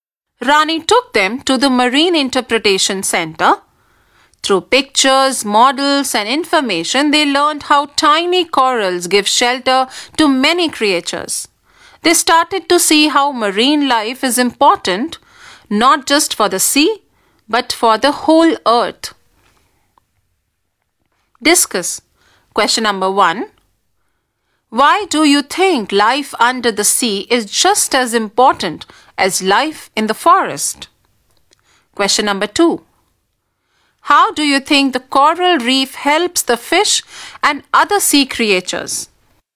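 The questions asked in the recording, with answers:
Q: How do you think the coral reef helps the fish and other sea creatures?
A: It gives them shelter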